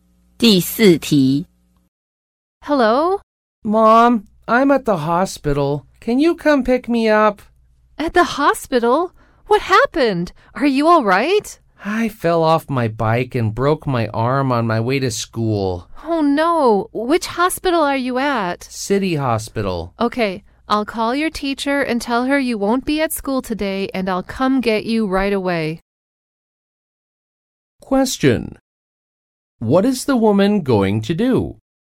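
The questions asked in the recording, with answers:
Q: Question.What is the woman going to do?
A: Call the teacher and go pick up her child at City Hospital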